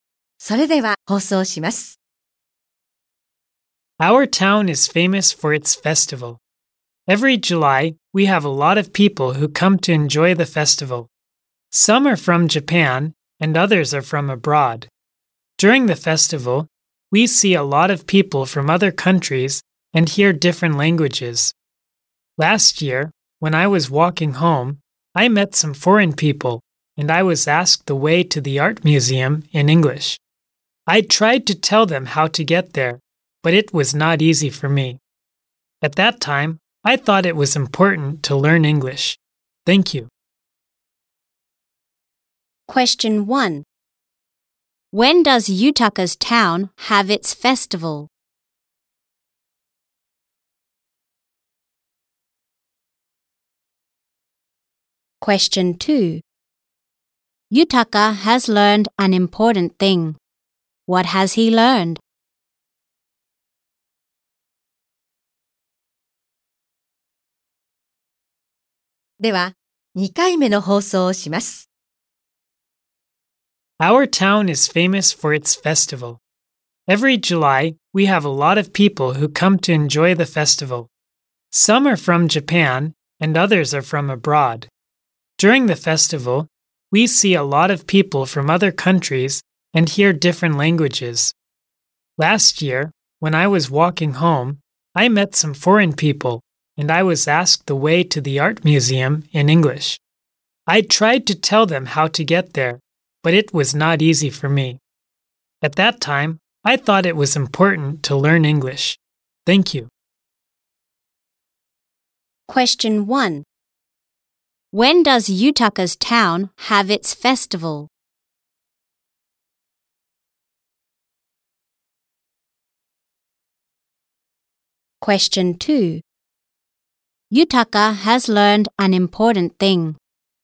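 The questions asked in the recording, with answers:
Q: When does Yutaka's town have its festival?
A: Every July

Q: Yutaka has learned an important thing. What has he learned?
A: That it is important to learn English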